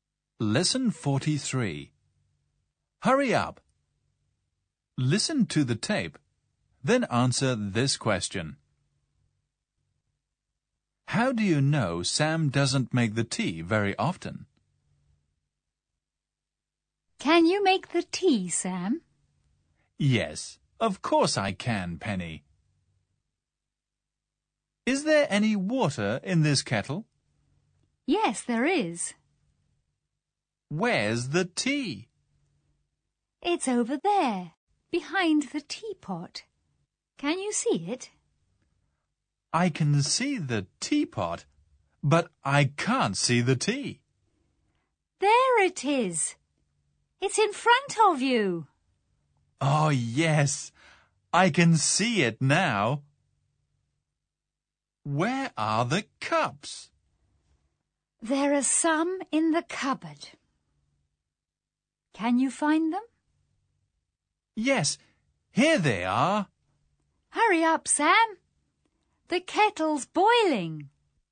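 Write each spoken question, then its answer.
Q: How do you know Sam doesn't make the tea very often?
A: He doesn't know where the tea and the cups are.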